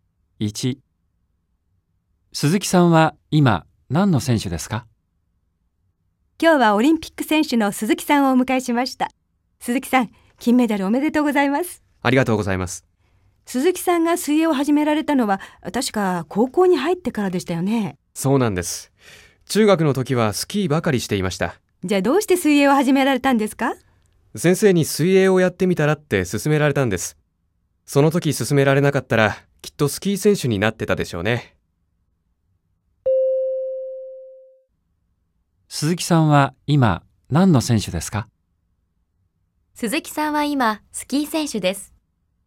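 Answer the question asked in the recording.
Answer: ×(水泳の選手)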